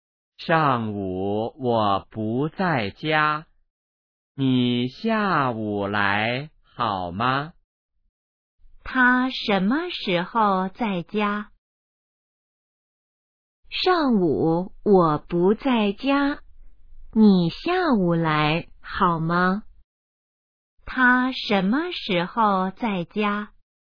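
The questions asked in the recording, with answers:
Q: 他什么时候在家?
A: 下午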